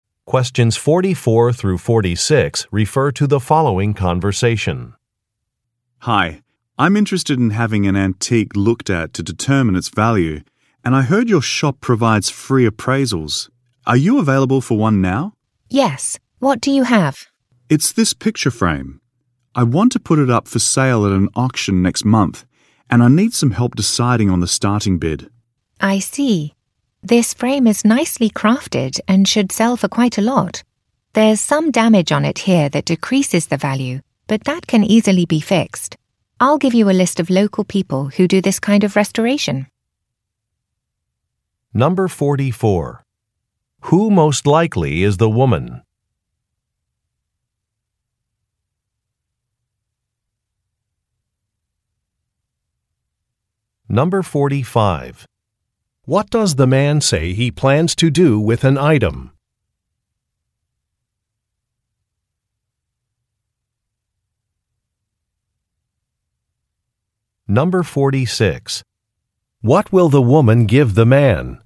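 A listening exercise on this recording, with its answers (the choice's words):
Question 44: Who most likely is the woman?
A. An antiques appraiser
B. An interior decorator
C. A graphic artist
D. A repair technician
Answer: An antiques appraiser

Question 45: What does the man say he plans to do with an item?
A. Give it to a family member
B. Donate it to a museum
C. Display it in his home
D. Sell it at an auction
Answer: Sell it at an auction

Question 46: What will the woman give the man?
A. A brochure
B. A list of contacts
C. A bill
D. An event schedule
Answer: A list of contacts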